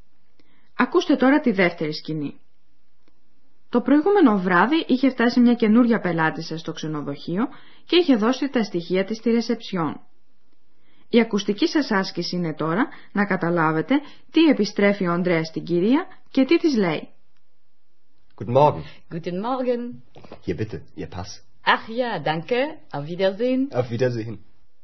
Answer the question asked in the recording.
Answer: Ο Ανδρέας επιστρέφει στην κυρία το διαβατήριό της που του το είχε παραδώσει το περασμένο βράδυ για να συμπληρώσει το σχετικό δελτίο.